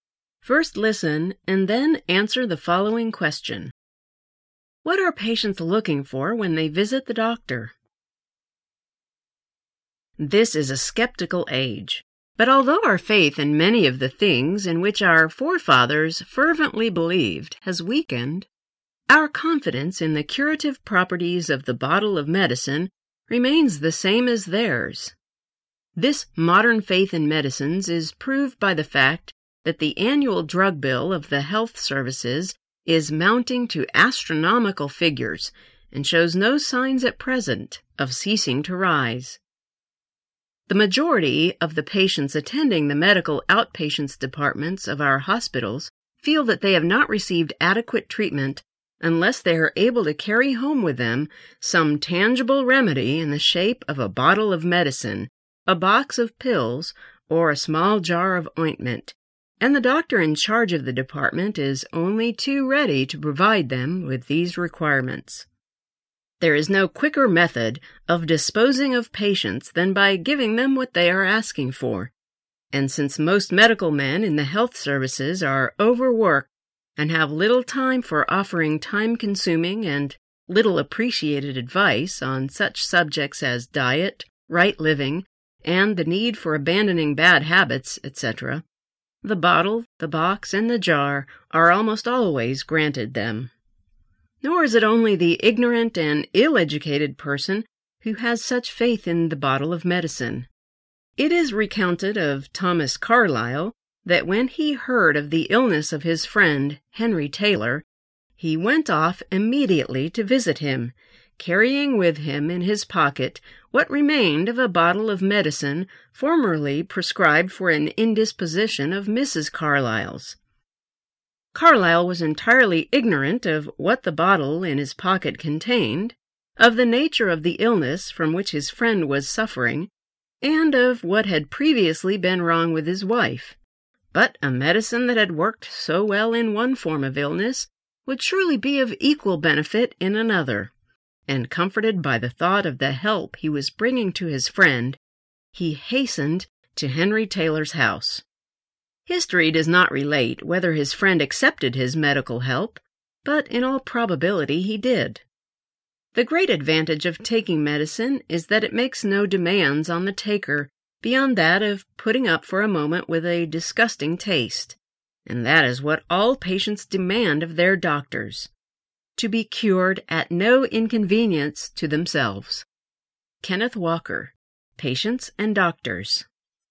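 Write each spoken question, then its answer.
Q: What are patients looking for when they visit the doctor?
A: A tangible remedy such as medicine, pills or ointment — to be cured at no inconvenience to themselves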